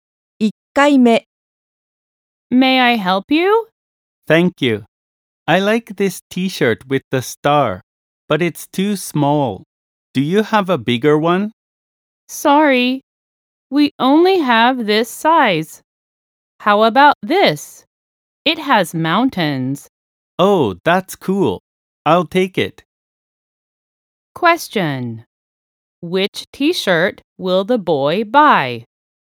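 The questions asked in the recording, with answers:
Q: Which t-shirt will the boy buy?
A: The one with mountains.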